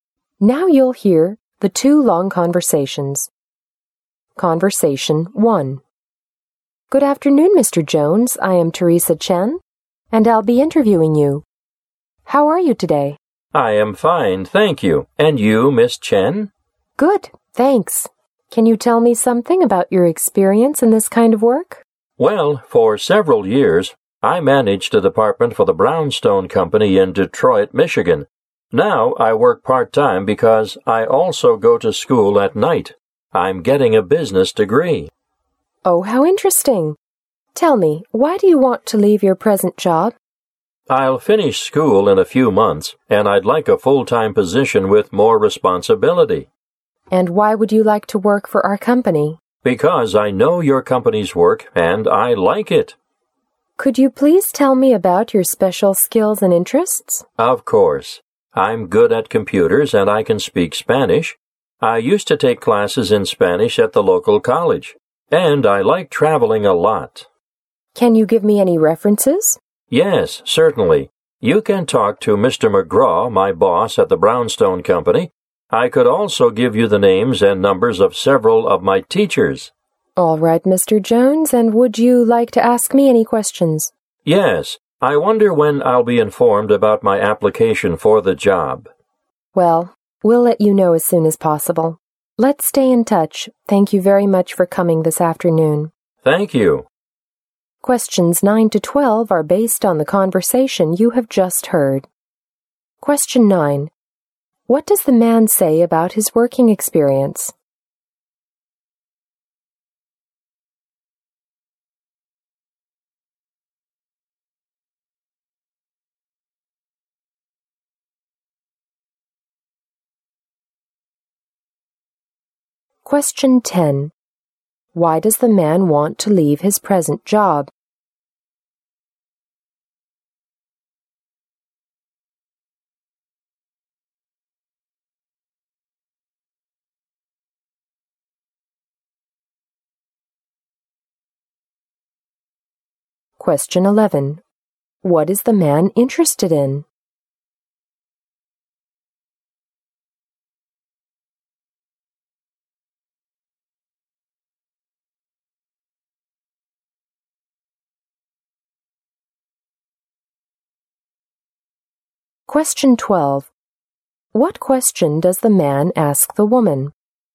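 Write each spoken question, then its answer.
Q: What does the man say about his working experience?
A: He managed a department for the Brownstone Company for several years.

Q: Why does the man want to leave his present job?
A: He wants a full-time position with more responsibility.

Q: What is the man interested in?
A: Traveling.

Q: What question does the man ask the woman?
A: When he will be informed about his application.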